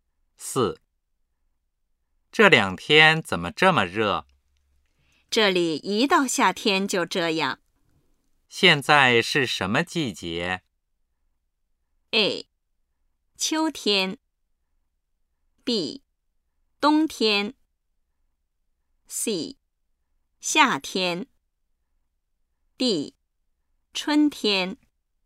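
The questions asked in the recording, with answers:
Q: 现在是什么季节?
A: C:夏天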